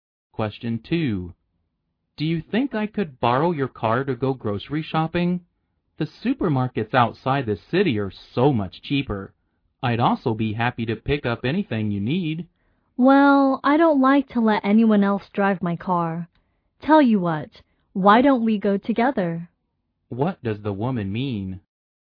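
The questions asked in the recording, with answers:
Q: What does the woman mean?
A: She won't lend her car but offers to go shopping with the man.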